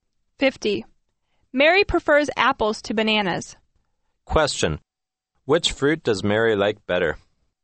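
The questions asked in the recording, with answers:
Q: Which fruit does Mary like better?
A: Apples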